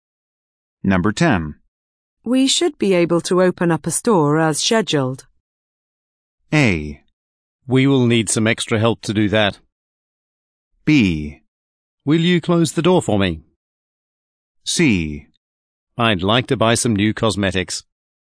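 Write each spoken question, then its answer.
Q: We should be able to open up a store as scheduled.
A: A: We will need some extra help to do that.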